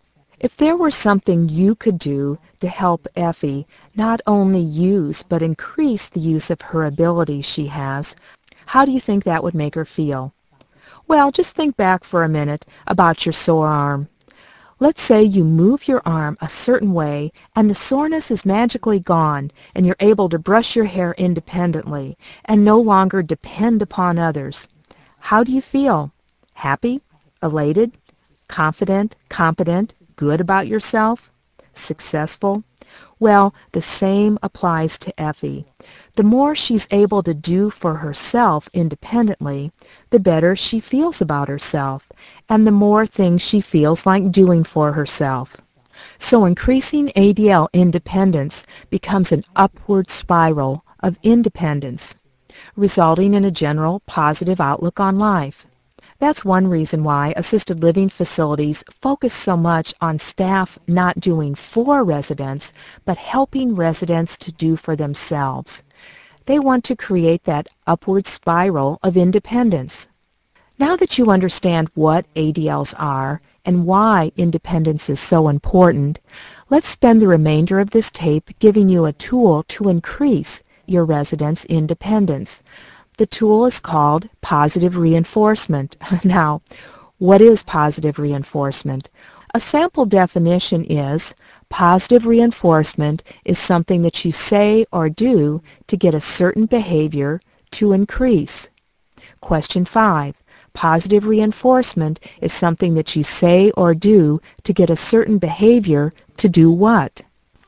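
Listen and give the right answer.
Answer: Increase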